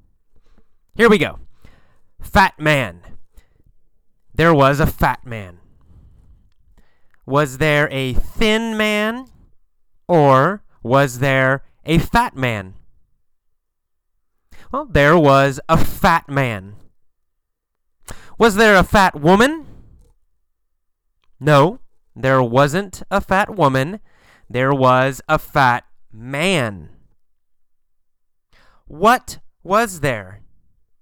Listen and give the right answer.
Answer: A fat man. There was a fat man.